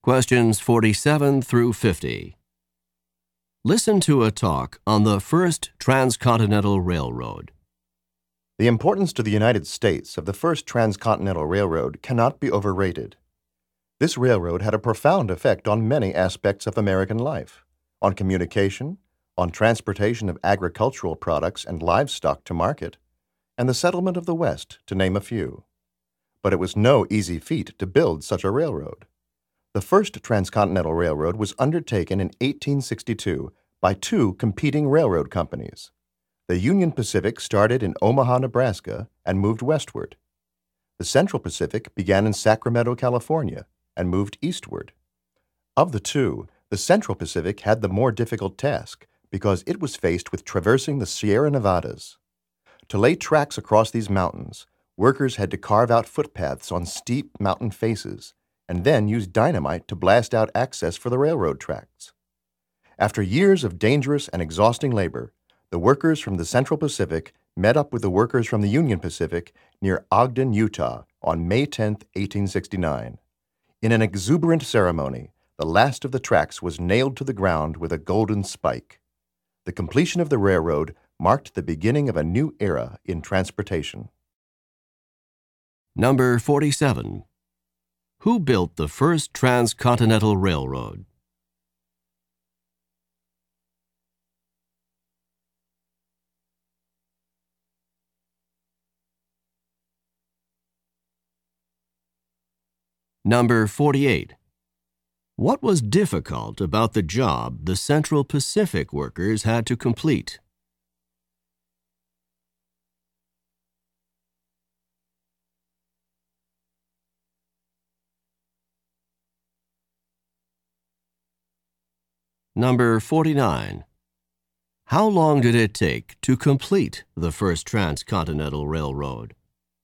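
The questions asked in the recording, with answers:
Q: Who built the first transcontinental railroad?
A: Two competing railroad companies: the Union Pacific and the Central Pacific

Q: What was difficult about the job the Central Pacific workers had to complete?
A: They had to cross the Sierra Nevada mountains, carving footpaths and blasting with dynamite

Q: How long did it take to complete the first transcontinental railroad?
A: About seven years (1862 to 1869)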